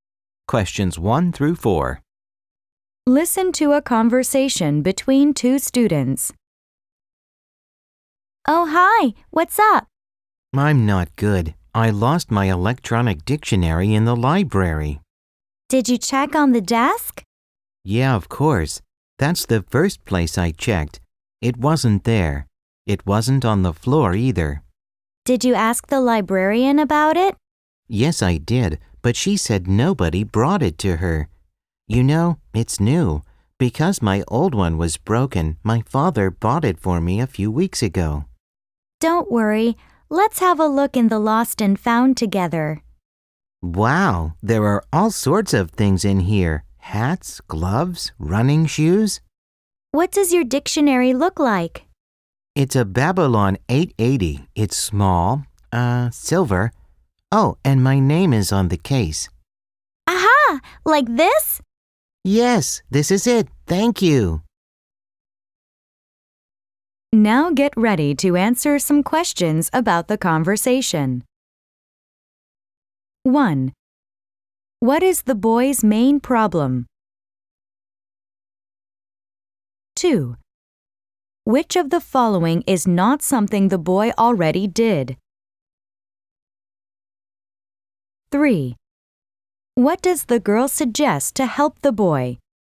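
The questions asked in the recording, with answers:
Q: What is the boy's main problem?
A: He lost his electronic dictionary in the library

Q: What does the girl suggest to help the boy?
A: Looking in the lost and found together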